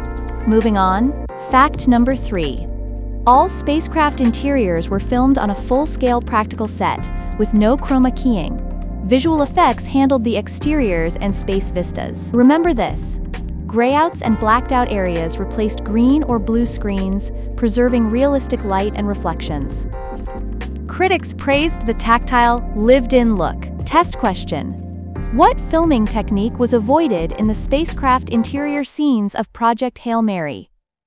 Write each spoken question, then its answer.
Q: What filming technique was avoided in the spacecraft interior scenes of Project Hail Mary?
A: Correct answer. Chroma keying.